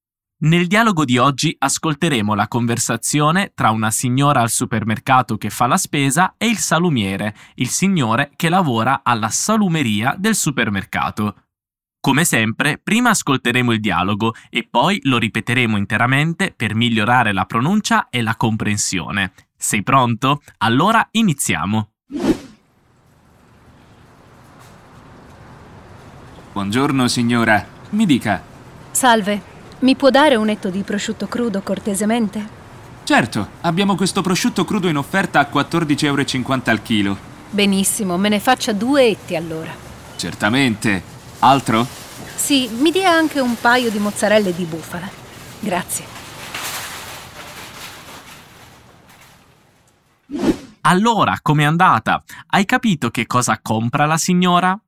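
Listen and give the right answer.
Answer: Due etti di prosciutto crudo e un paio di mozzarelle di bufala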